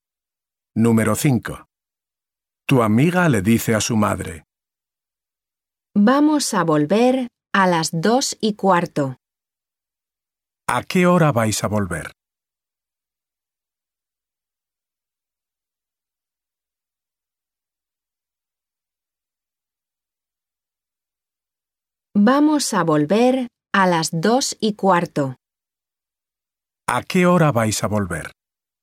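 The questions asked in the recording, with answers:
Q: ¿A qué hora vais a volver?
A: A las 2:15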